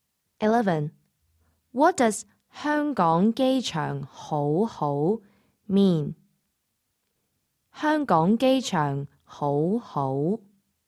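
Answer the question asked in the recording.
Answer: Hong Kong airport is very good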